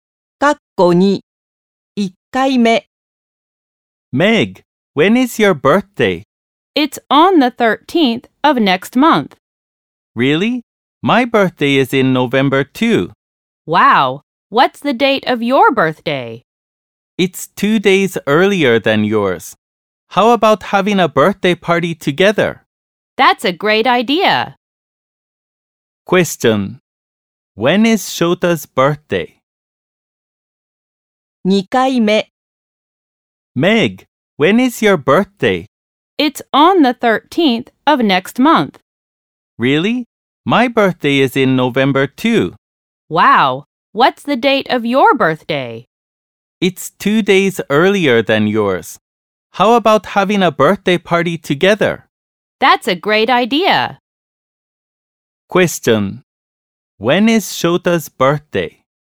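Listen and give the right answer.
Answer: November 11th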